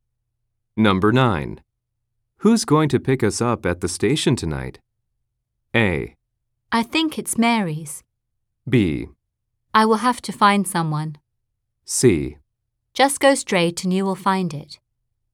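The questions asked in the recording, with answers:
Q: Who's going to pick us up at the station tonight?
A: B: I will have to find someone.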